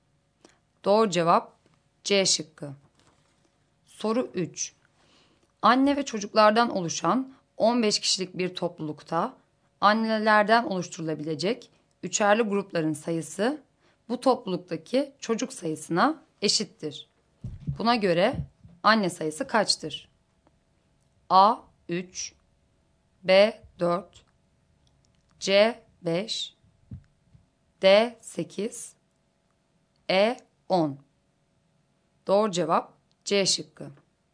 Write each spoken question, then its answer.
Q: Buna göre anne sayısı kaçtır?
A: Doğru cevap C şıkkı.